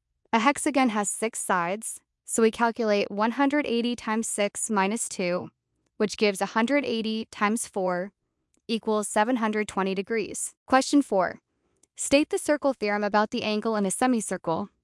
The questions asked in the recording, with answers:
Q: State the circle theorem about the angle in a semicircle.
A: The angle in a semicircle is always 90 degrees.